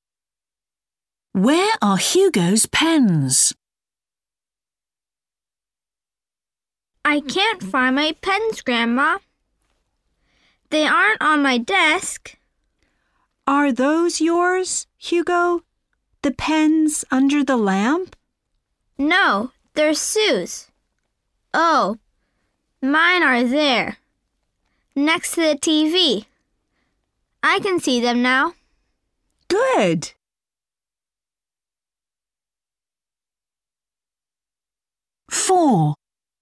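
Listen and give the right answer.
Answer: Next to the TV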